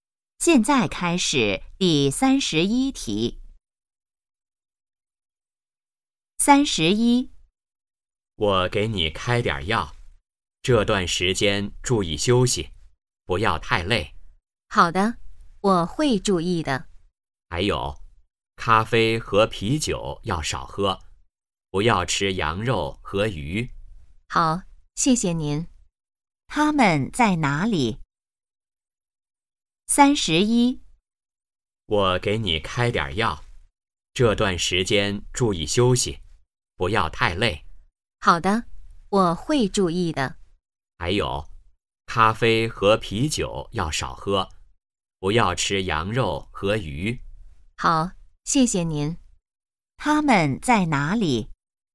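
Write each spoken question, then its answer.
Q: 他们在哪里?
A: 医院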